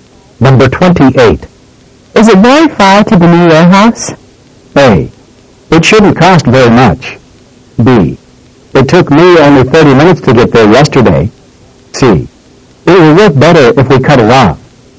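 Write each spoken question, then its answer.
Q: Is it very far to the new warehouse?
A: B: It took me only 30 minutes to get there yesterday.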